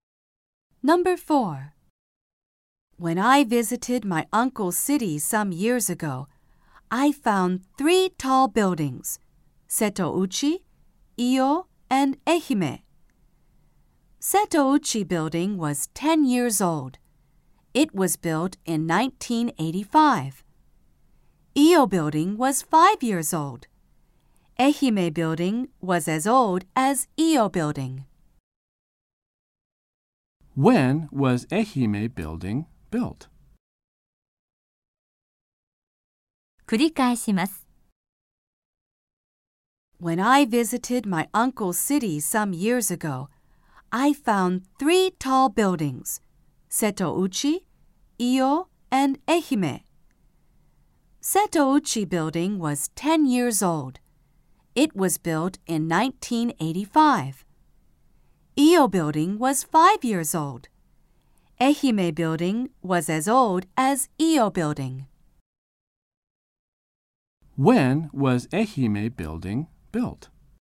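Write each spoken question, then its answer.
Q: When was Ehime building built?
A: In 1990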